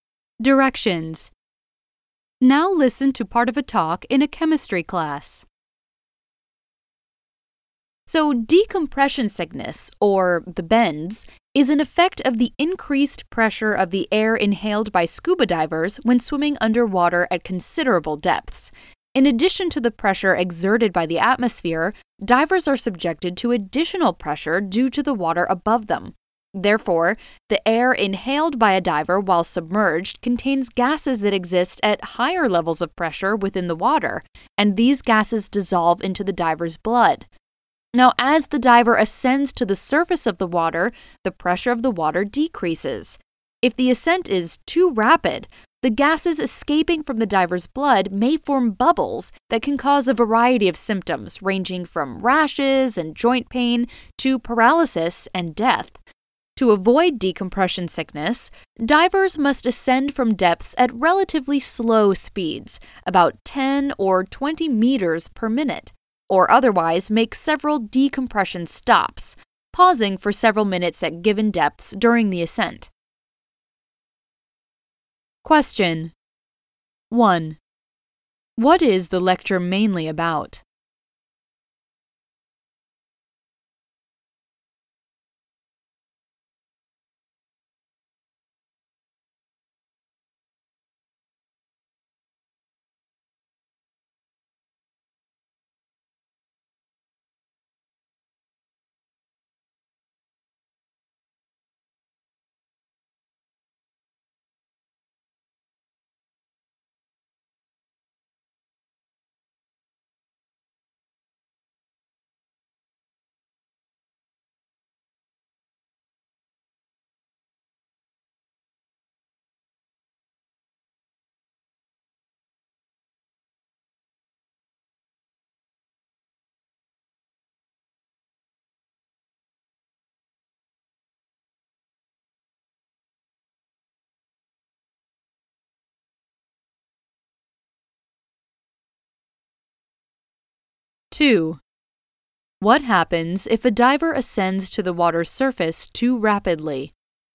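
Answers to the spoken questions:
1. Decompression sickness (the bends) in scuba divers and how to avoid it
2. Gases escaping from the blood may form bubbles, causing symptoms from rashes and joint pain to paralysis and death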